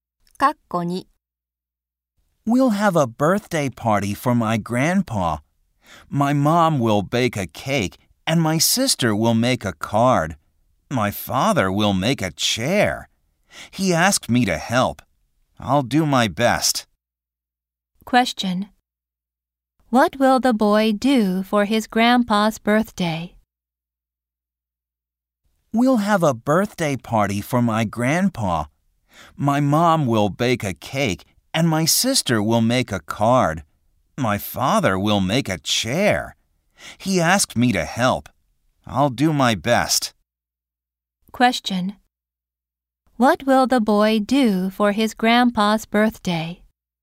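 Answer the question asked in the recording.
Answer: Help his father make a chair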